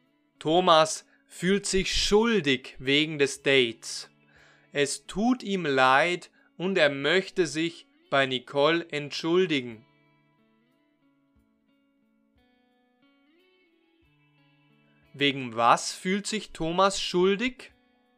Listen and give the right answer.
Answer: wegen des Dates. Er fühlt sich wegen des Dates schuldig.